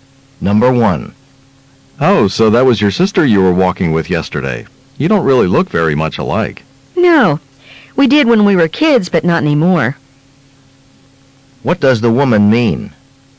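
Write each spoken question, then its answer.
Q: What does the woman mean?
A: She and her sister looked alike as children but no longer do.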